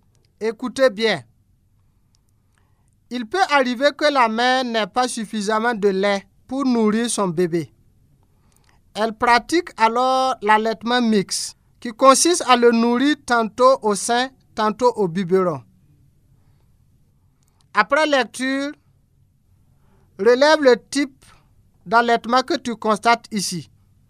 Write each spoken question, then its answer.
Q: Après lecture, relève le type d'allaitement que tu constates ici.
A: Oui, c'est l'allaitement mixte.